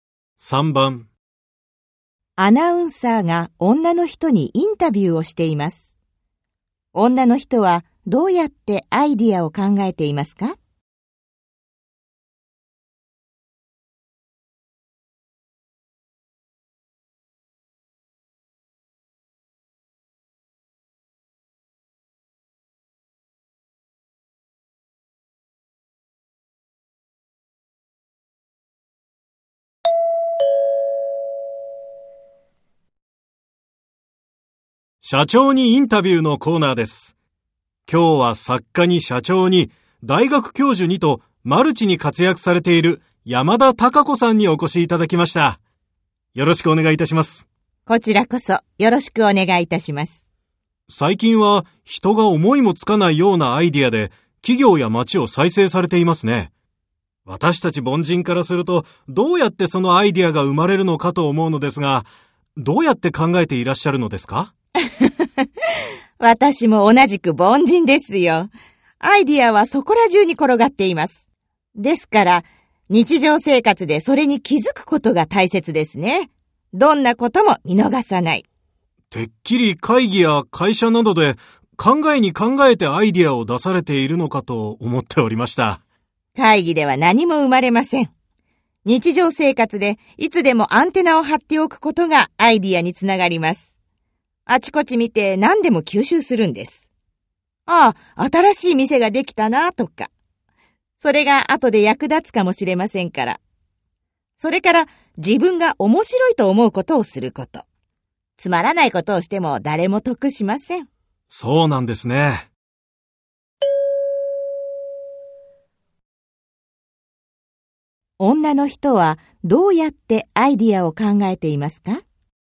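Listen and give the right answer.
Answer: 日常生活でいつもアンテナを張って、何でも見逃さずに吸収する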